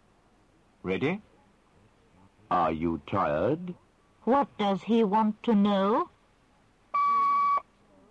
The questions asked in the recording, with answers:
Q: What does he want to know?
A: He wants to know if you are tired.